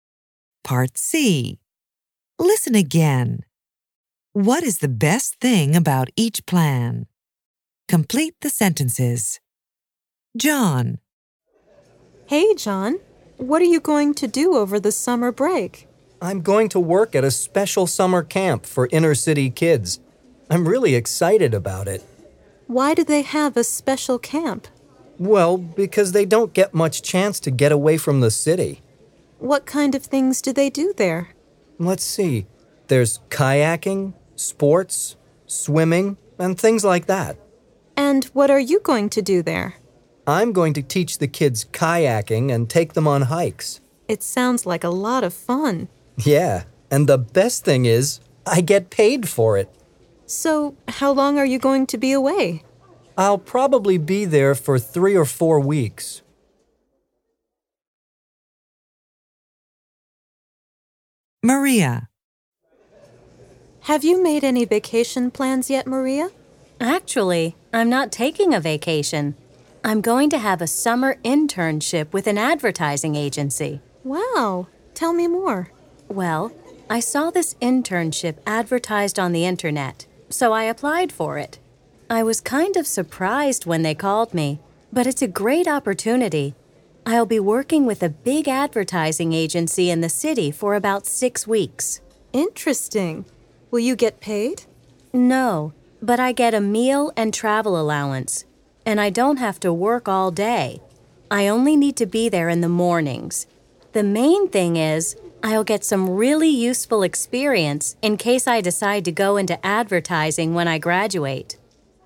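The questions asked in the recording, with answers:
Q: What is the best thing about each plan?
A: John: he gets paid for it; Maria: she'll get really useful experience for a possible advertising career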